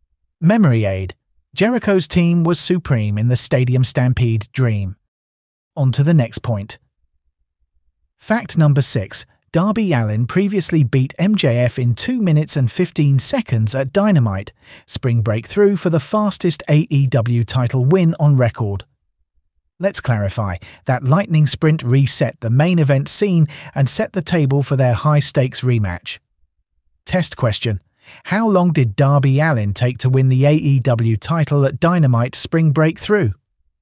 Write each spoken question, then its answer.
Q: How long did Darby Allin take to win the AEW title at Dynamite Spring Breakthrough?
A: 2 minutes and 15 seconds.